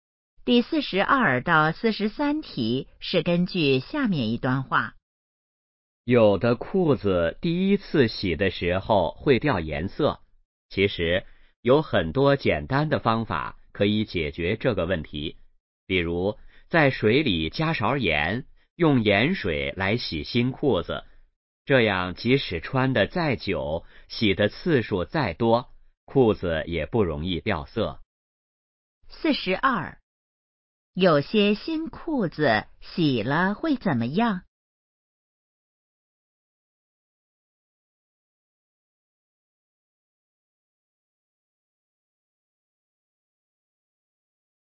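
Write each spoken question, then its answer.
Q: 有些新裤子洗了会怎么样?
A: 掉颜色

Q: 怎样解决这个问题?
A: 用盐水洗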